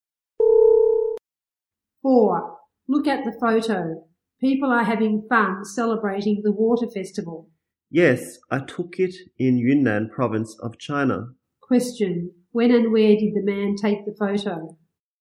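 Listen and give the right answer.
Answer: During the water festival, in Yunnan province of China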